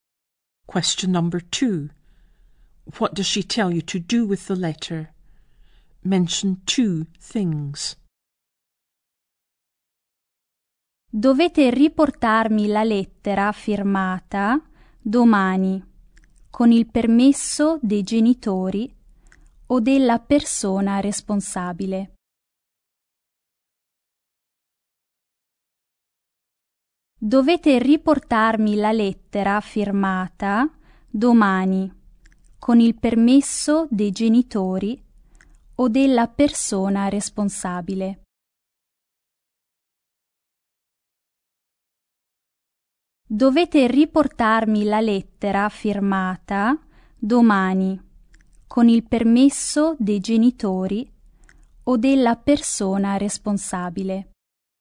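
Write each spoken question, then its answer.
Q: What does she tell you to do with the letter?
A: Bring it back tomorrow, signed, with permission from parents or the person responsible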